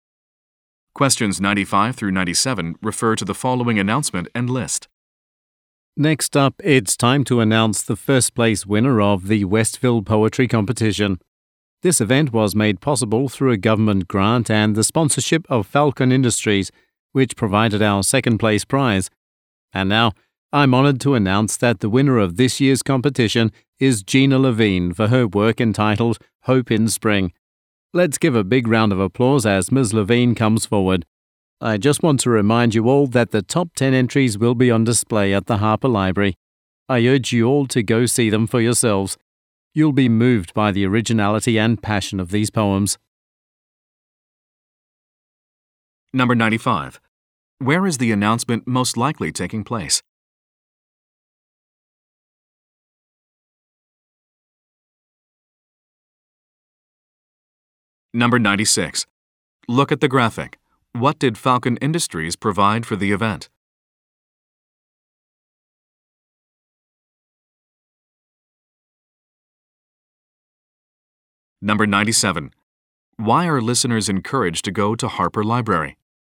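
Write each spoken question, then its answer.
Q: Why are listeners encouraged to go to Harper Library?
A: To see the top 10 poems on display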